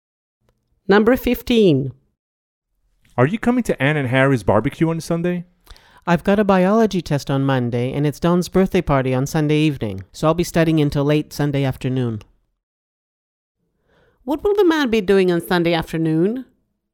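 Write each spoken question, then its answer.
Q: What will the man be doing on Sunday afternoon?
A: studying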